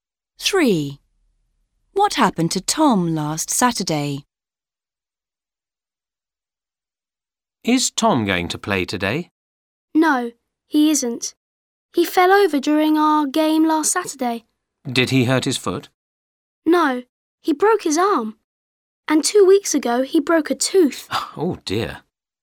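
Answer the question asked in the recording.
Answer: He broke his arm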